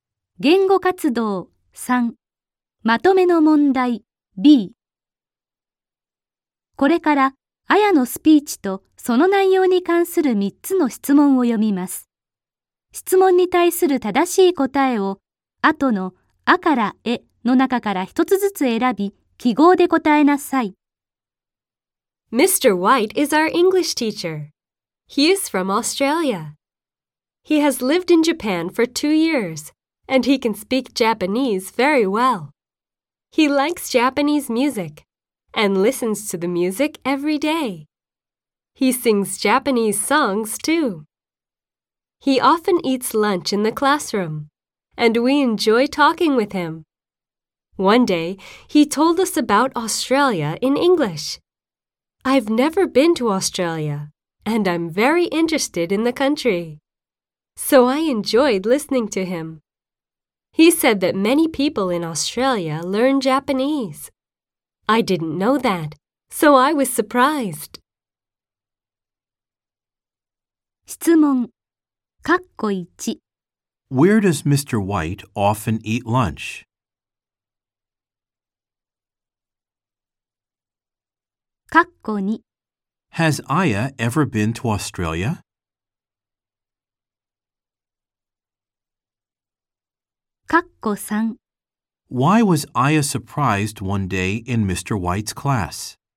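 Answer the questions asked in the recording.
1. In the classroom.
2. No, she hasn't.
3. Because she learned that many people in Australia learn Japanese.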